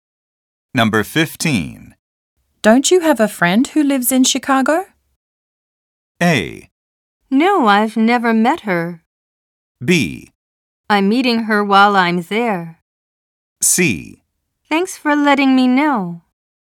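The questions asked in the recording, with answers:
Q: Don't you have a friend who lives in Chicago?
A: B: I'm meeting her while I'm there.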